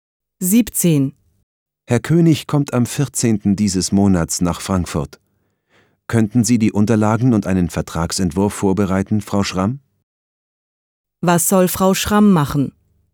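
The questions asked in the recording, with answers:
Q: Was soll Frau Schramm machen?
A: Die Unterlagen und einen Vertragsentwurf vorbereiten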